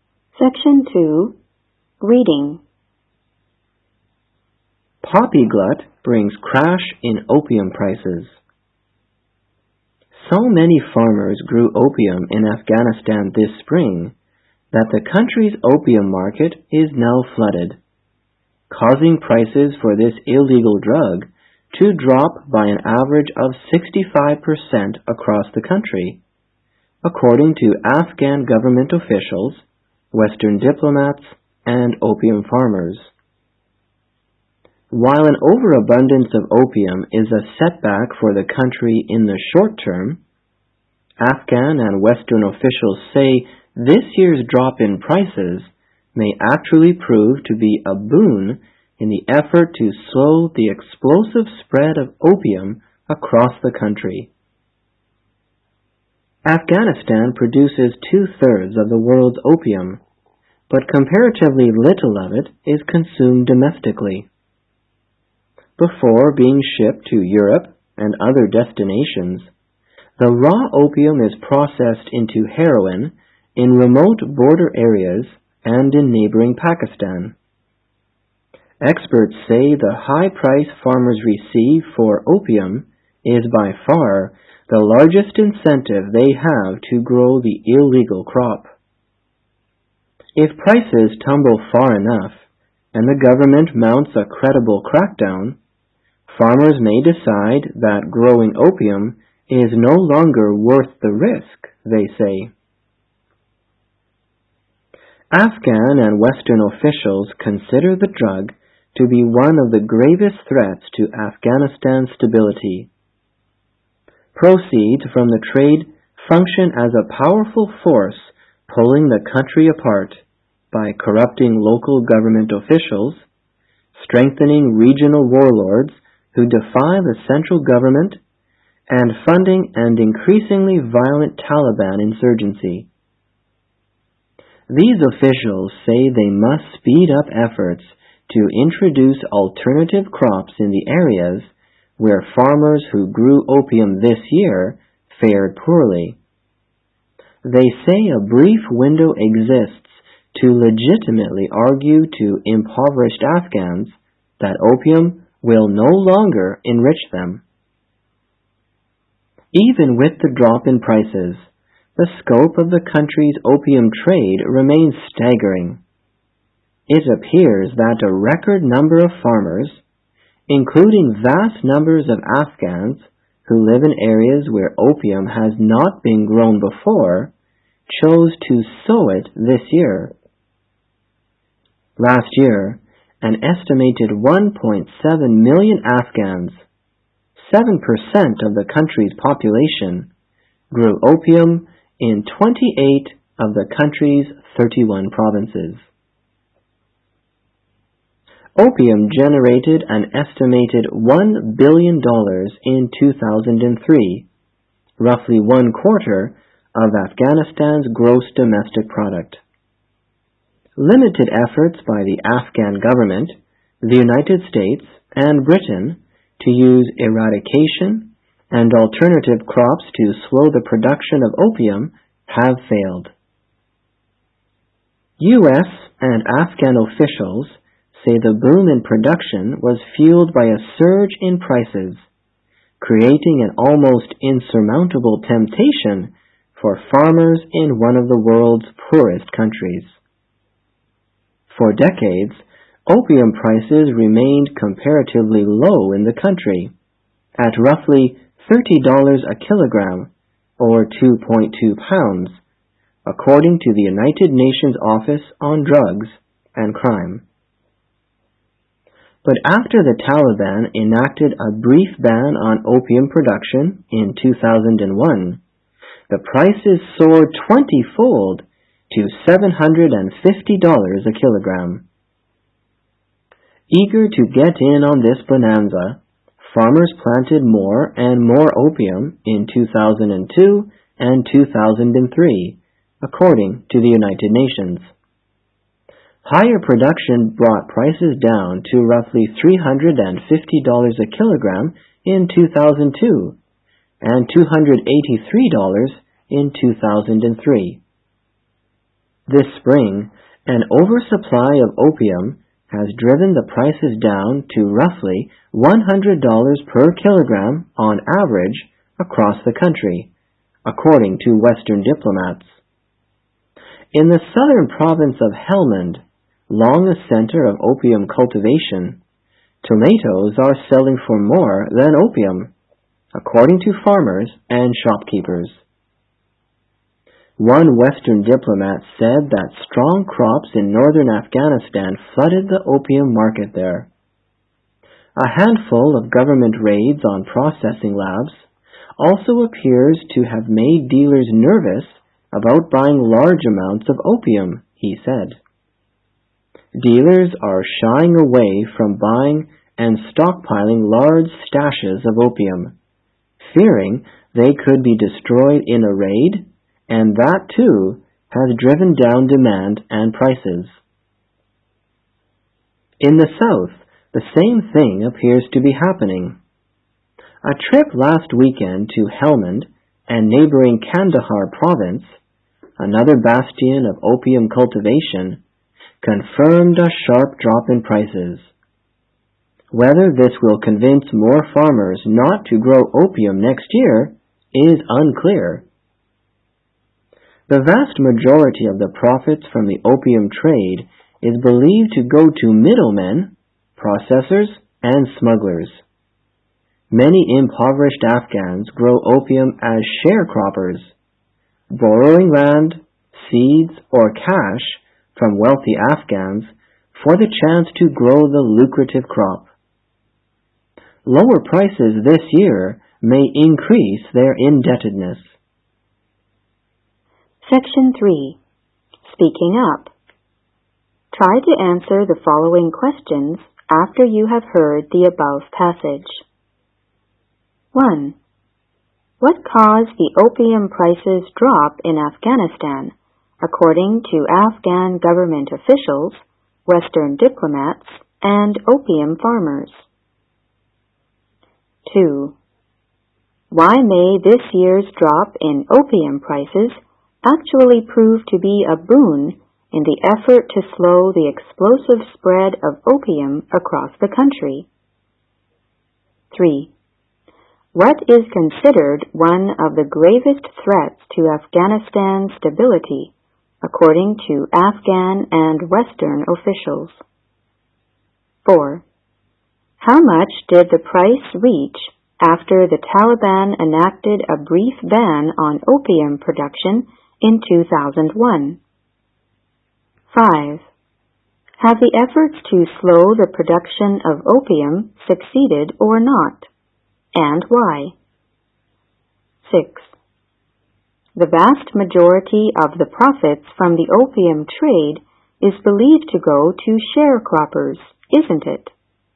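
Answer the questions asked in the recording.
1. So many farmers grew opium that the market was flooded (oversupply)
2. If prices fall far enough and the government cracks down, farmers may decide growing opium is no longer worth the risk
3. The opium (drug) trade
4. $750 a kilogram (a 20-fold rise)
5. No; the efforts were limited, and a surge in prices made growing opium an almost irresistible temptation for poor farmers
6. No, it goes to middlemen, processors and smugglers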